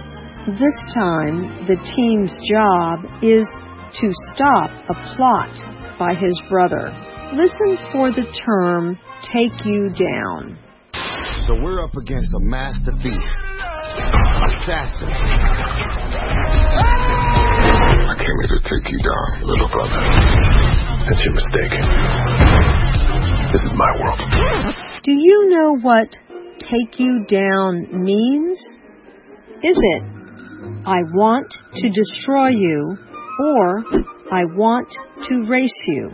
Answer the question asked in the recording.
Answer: Take you down means I want to destroy you.